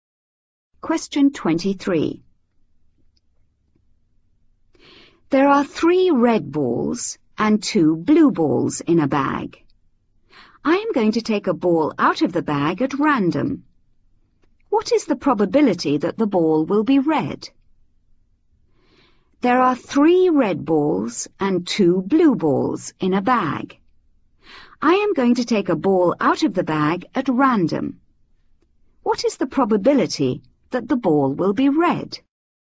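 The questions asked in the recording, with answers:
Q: What is the probability that the ball will be red?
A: 3/5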